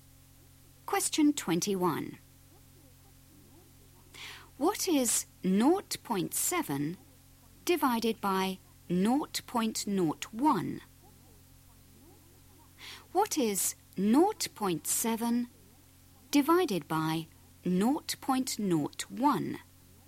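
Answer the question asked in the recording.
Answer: 70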